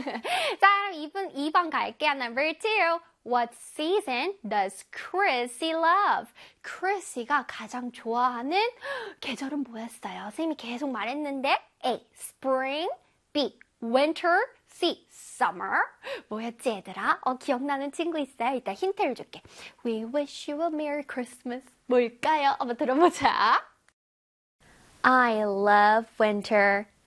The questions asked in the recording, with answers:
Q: What season does Chrissy love?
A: 그래서 정답은 빠밤 winter 되겠습니다.